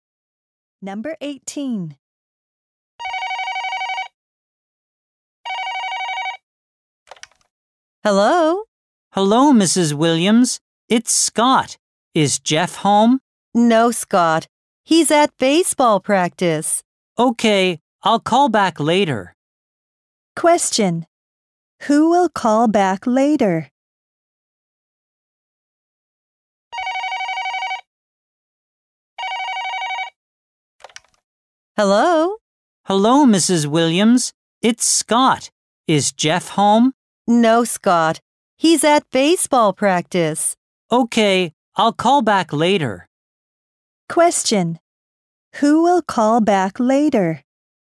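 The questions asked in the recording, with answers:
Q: Who will call back later?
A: Scott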